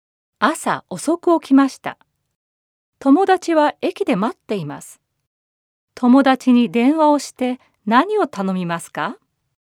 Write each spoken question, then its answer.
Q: 朝遅く起きました。友達は駅で待っています。友達に電話をして何を頼みますか?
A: もう少し待ってほしいんだけど。